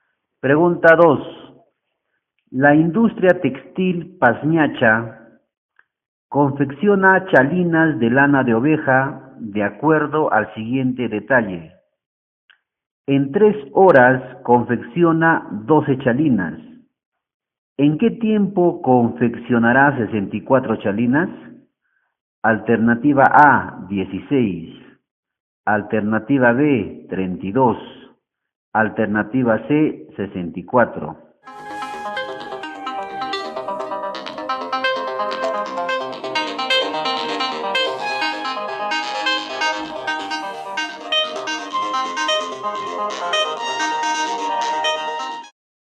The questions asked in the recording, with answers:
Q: ¿En qué tiempo confeccionará 64 chalinas?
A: La respuesta correcta es la alternativa A, 16.